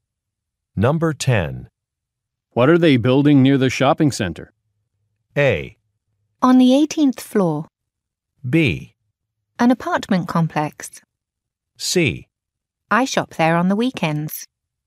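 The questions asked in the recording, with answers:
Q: What are they building near the shopping center?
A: B: An apartment complex.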